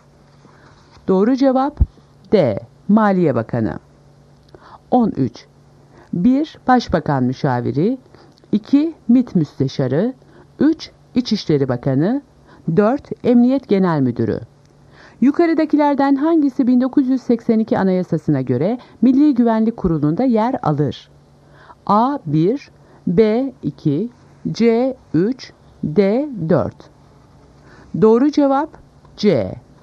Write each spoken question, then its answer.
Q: Yukarıdakilerden hangisi 1982 Anayasası'na göre Milli Güvenlik Kurulu'nda yer alır?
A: Doğru cevap C. 3.